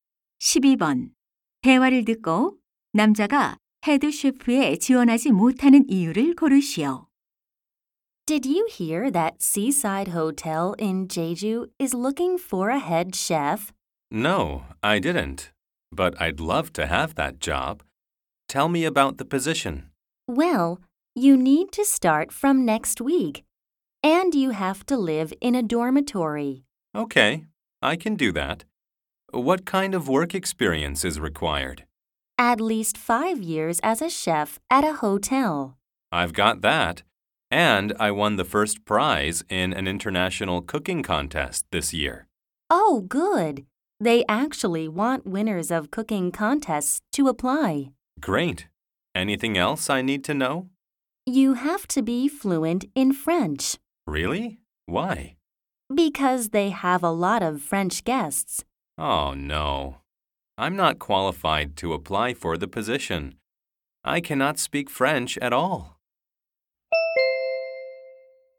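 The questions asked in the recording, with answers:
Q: 대화를 듣고 남자가 헤드 셰프에 지원하지 못하는 이유를 고르시오.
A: 프랑스어를 전혀 못해서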